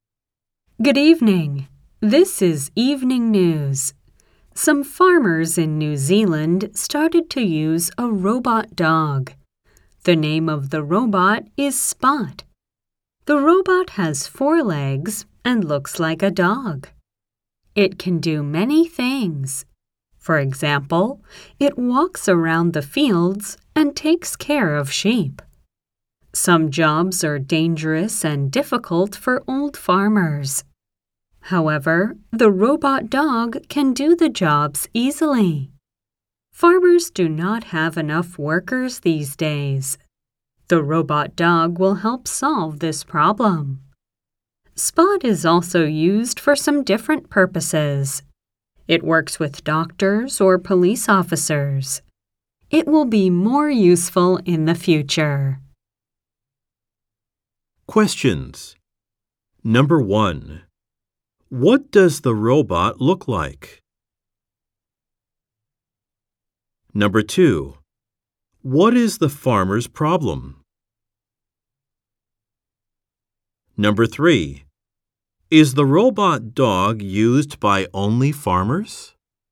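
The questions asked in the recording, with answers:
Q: What does the robot look like?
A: It looks like a dog (with 4 legs).

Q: What is the farmer's problem?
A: They do not have enough workers.

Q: Is the robot dog used by only farmers?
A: No, it also works with doctors and police officers.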